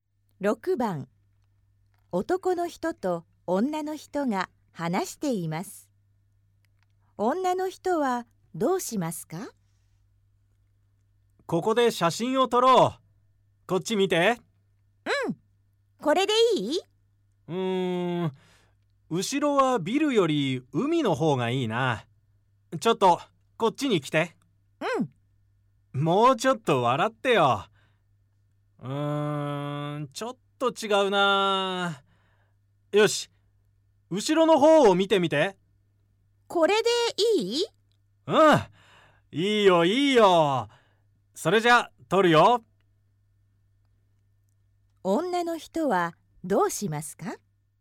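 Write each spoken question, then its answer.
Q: 女の人はどうしますか?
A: 海を背にして、後ろの方を見て写真を撮ってもらう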